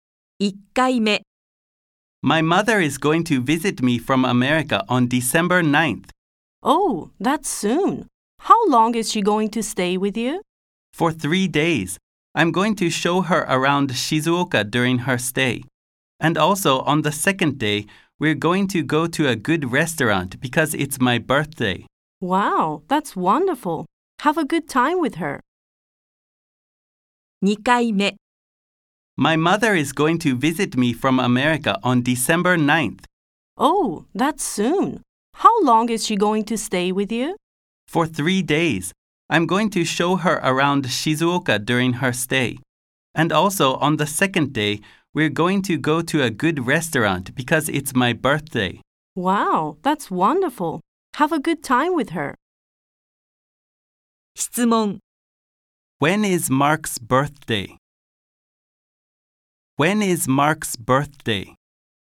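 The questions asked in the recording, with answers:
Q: When is Mark's birthday?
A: December 10th.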